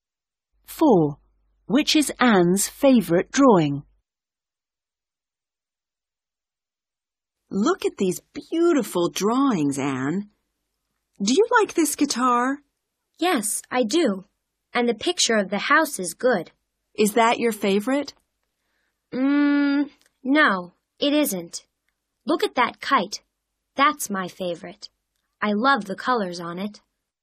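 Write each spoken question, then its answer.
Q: Which is Anne's favourite drawing?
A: The kite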